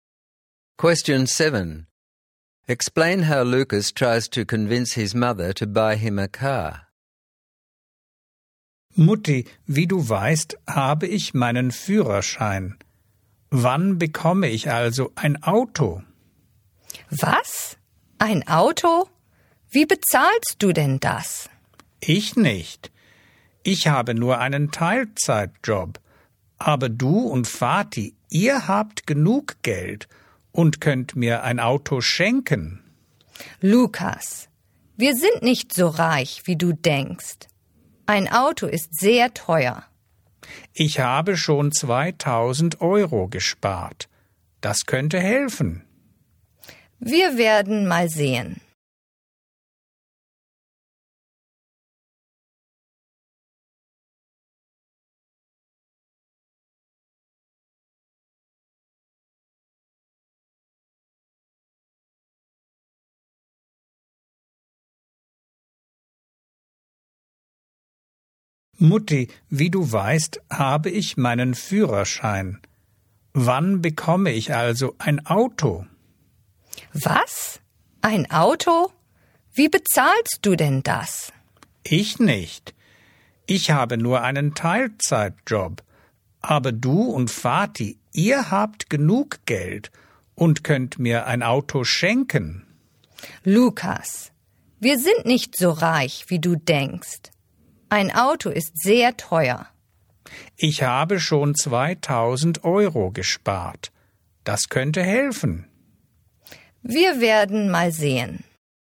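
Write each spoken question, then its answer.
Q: Explain how Lucas tries to convince his mother to buy him a car.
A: He says he has his licence, his parents have enough money, and he has already saved 2000 euros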